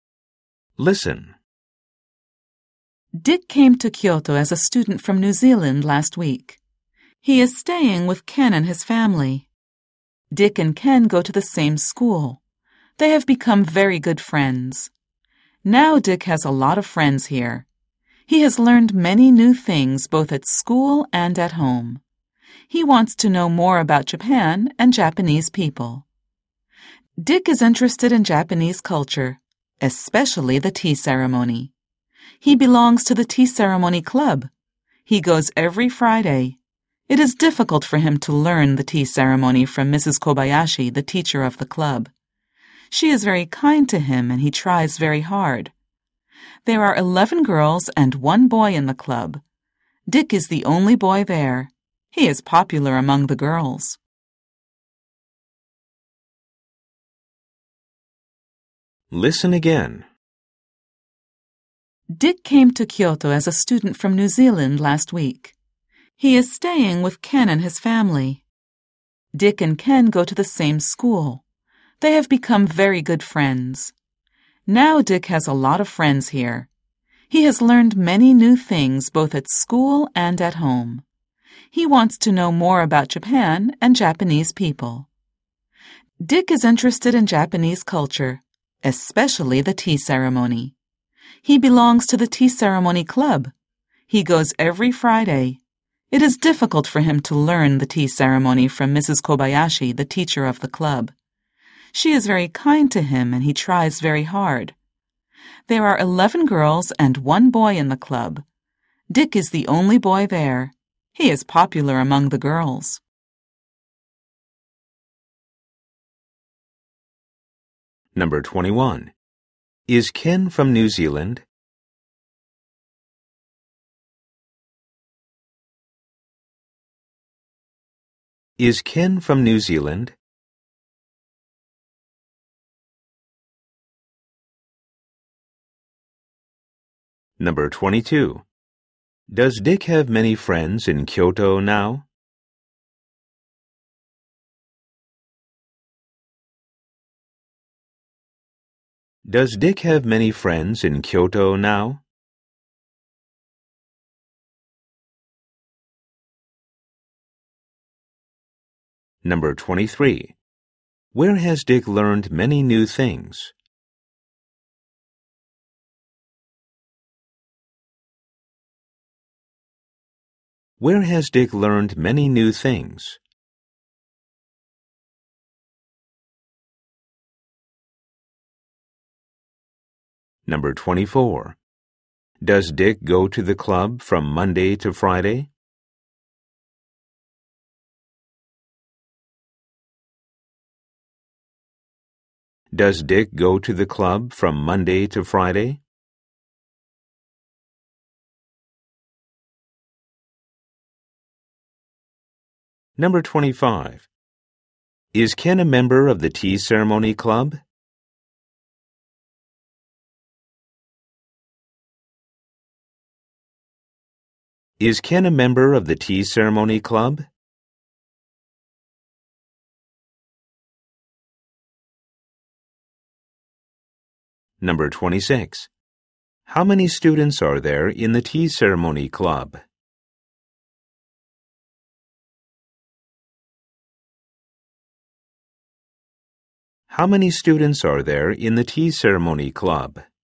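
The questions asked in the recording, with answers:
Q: Is Ken from New Zealand?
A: No, he isn't.

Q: Does Dick have many friends in Kyoto now?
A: Yes, he does.

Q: Where has Dick learned many new things?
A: Both at school and at home.

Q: Does Dick go to the club from Monday to Friday?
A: No, he goes every Friday.

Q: Is Ken a member of the tea ceremony club?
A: No, he isn't.

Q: How many students are there in the tea ceremony club?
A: Twelve.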